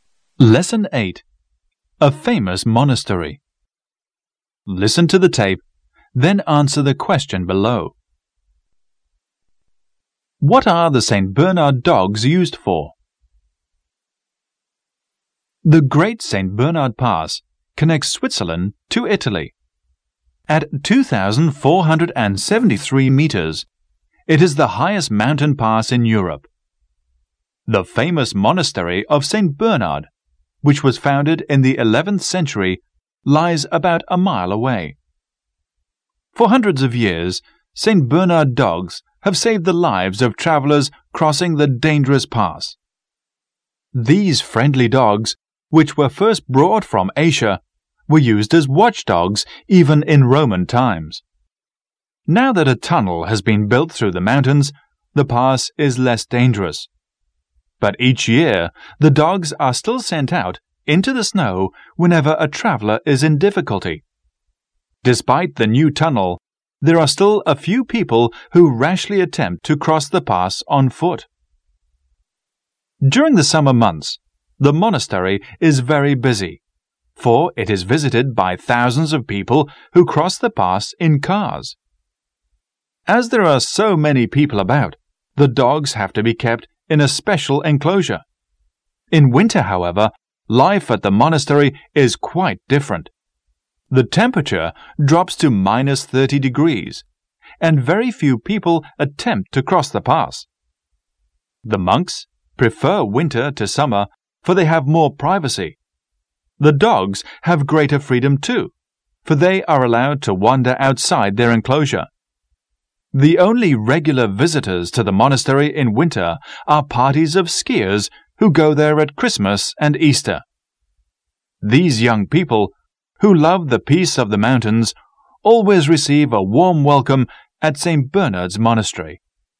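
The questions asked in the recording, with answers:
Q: What are the St. Bernard dogs used for?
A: To save the lives of travelers crossing the dangerous pass (rescuing travelers in difficulty in the snow)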